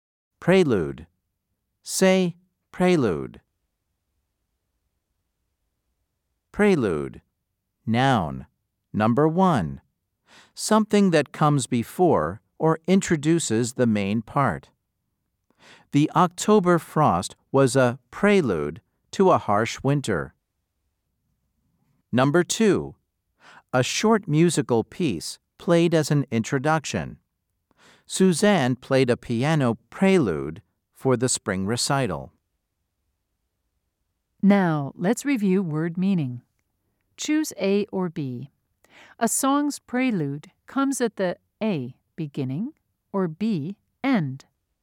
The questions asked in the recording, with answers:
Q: Choose A or B. A song's prelude comes at the A, beginning, or B, end.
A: If you said A, you are right.